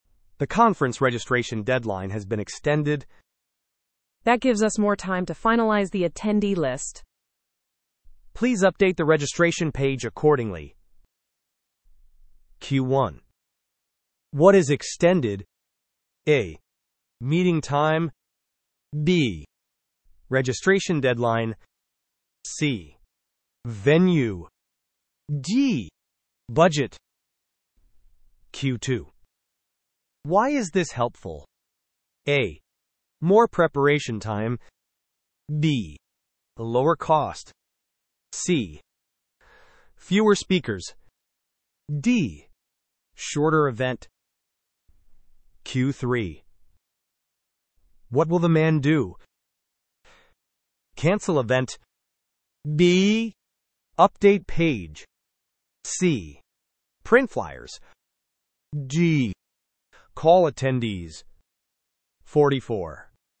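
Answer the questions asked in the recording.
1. B: Registration deadline.
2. A: More preparation time.
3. B: Update page.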